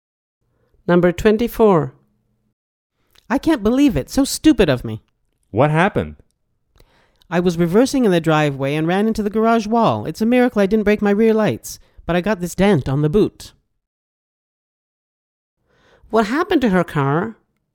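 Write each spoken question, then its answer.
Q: What happened to her car?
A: It got a dent on the boot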